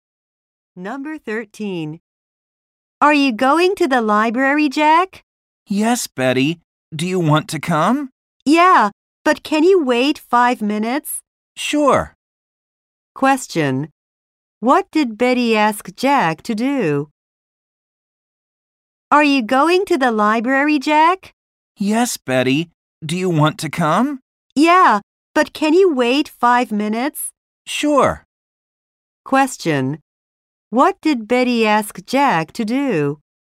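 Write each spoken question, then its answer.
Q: What did Betty ask Jack to do?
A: Wait 5 minutes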